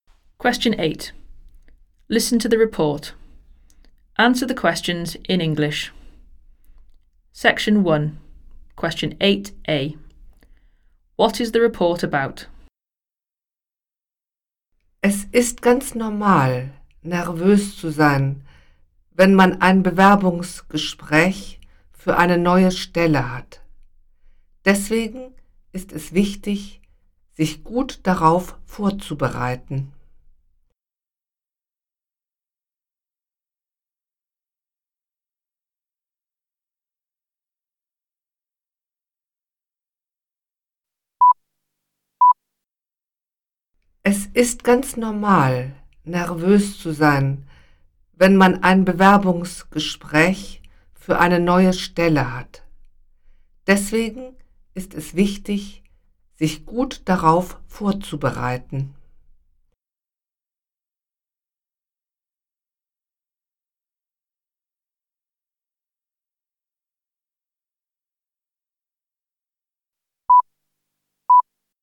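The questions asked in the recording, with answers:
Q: What is the report about?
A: Preparing for a job interview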